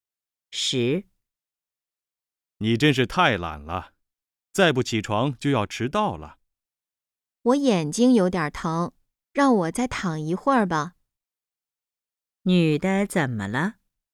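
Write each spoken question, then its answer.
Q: 女的怎么了?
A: 眼睛有点疼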